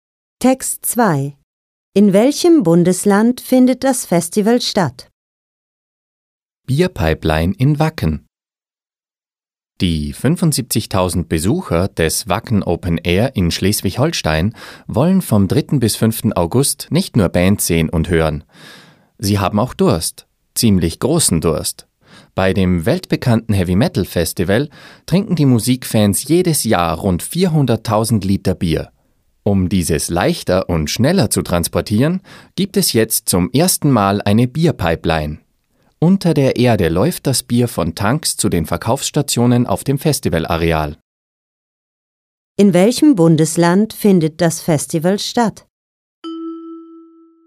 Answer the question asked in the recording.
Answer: Es findet in Schleswig-Holstein statt.